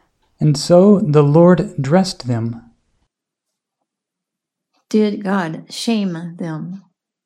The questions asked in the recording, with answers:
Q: Did God shame them?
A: No, God dressed them. God covered them.